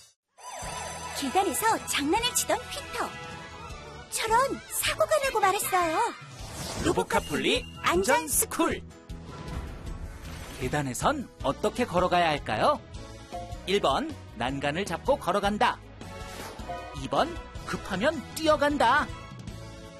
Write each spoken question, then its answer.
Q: 계단에선 어떻게 걸어가야 할까요?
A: 정답은 1번.